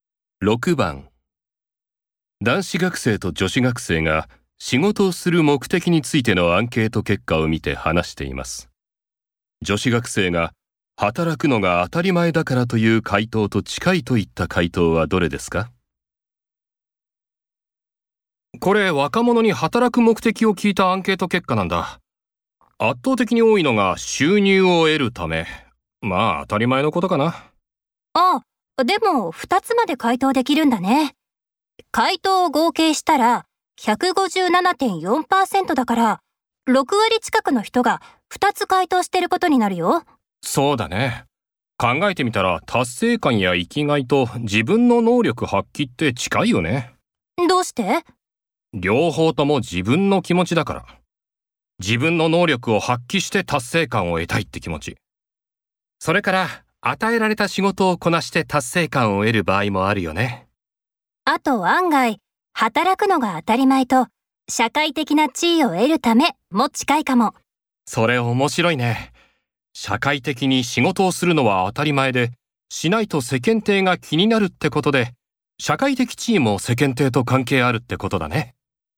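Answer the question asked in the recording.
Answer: 社会的な地位を得るため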